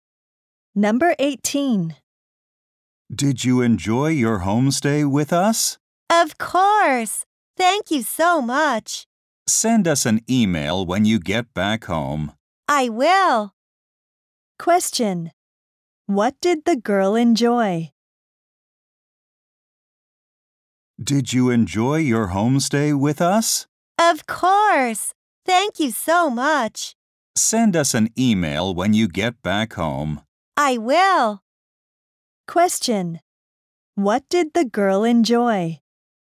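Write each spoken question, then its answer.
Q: What did the girl enjoy?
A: Her homestay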